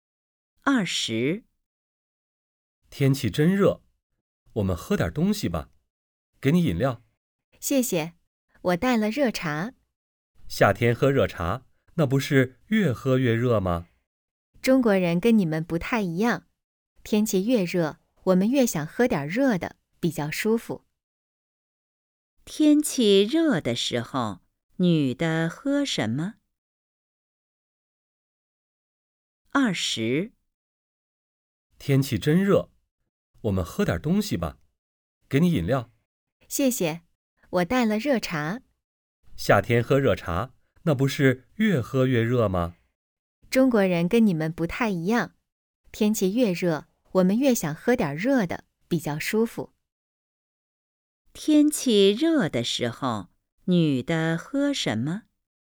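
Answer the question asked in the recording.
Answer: 热茶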